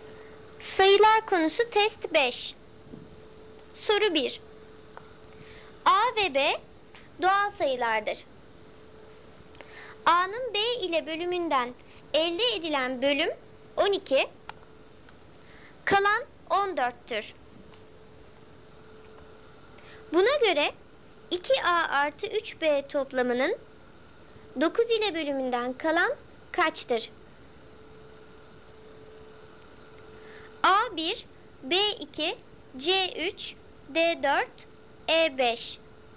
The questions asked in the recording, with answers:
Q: Buna göre 2A artı 3B toplamının 9 ile bölümünden kalan kaçtır?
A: Doğru cevap A1.